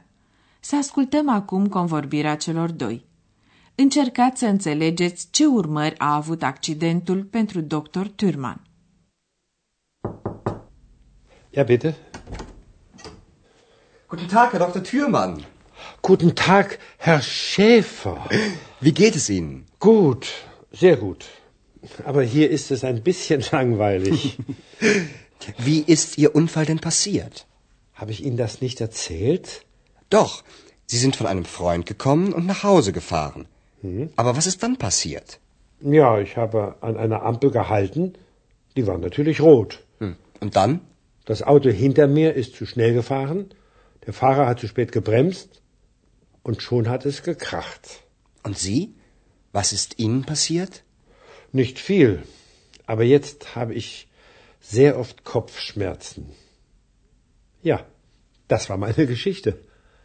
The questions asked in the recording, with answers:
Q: Încercați să înțelegeți ce urmări a avut accidentul pentru Dr.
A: În urma accidentului, pe Dr. Thürmann îl doare adesea capul.